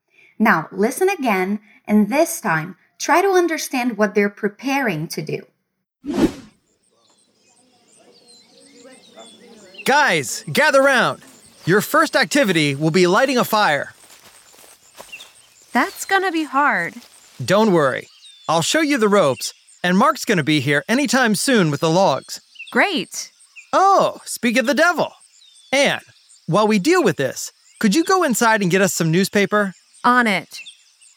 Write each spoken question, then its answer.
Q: Now, listen again, and this time try to understand what they're preparing to do.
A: They're preparing to light a fire.